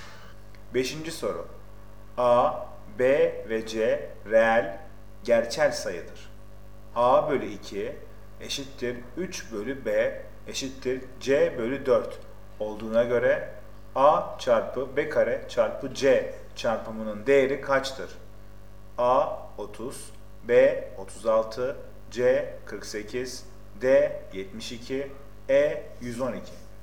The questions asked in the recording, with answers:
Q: A bölü 2 eşittir 3 bölü B eşittir C bölü 4 olduğuna göre A çarpı B kare çarpı C çarpımının değeri kaçtır?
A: Doğru cevap D 72.